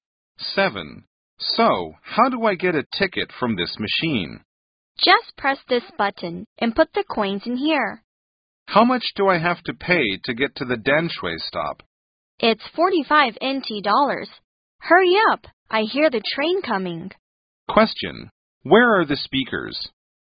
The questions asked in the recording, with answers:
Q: Question, where are the speakers?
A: at an MRT station